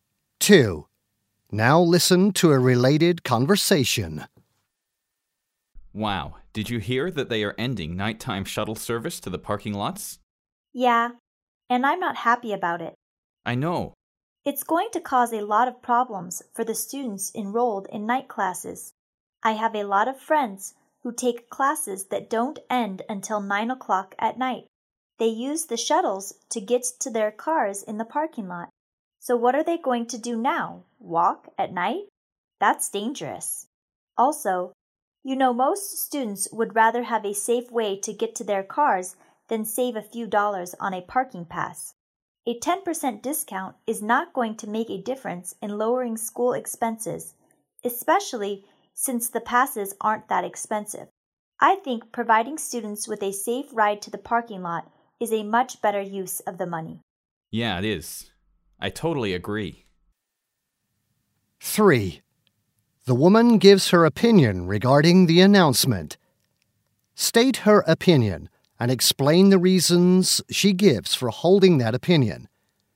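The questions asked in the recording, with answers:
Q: The woman gives her opinion regarding the announcement. State her opinion and explain the reasons she gives for holding that opinion.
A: She opposes ending nighttime shuttle service: night-class students would have to walk to their cars in the dark, which is dangerous, and students would prefer a safe ride over a small 10% discount on parking passes that are already cheap.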